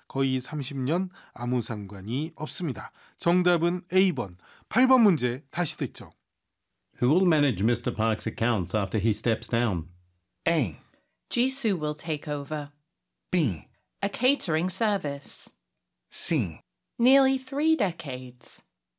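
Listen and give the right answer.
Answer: A: Jisoo will take over.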